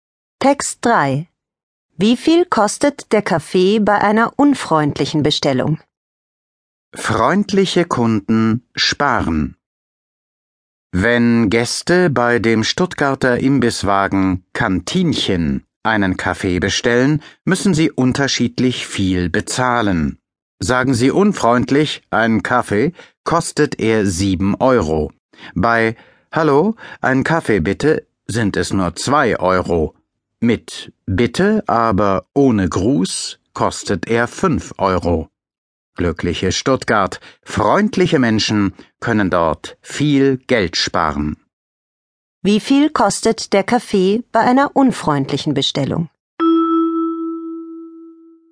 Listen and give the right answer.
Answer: Er kostet sieben Euro.